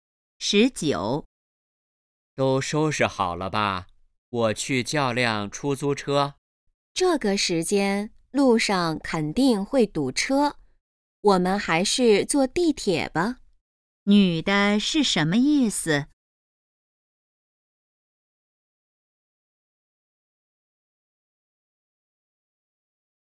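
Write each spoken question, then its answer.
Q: 女的是什么意思?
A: 坐地铁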